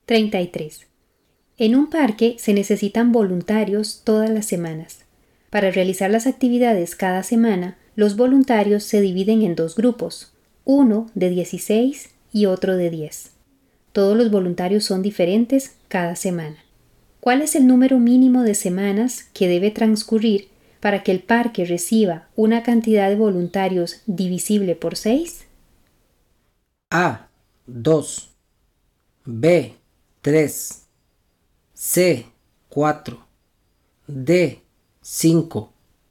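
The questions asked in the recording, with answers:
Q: ¿Cuál es el número mínimo de semanas que debe transcurrir para que el parque reciba una cantidad de voluntarios divisible por 6?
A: B: 3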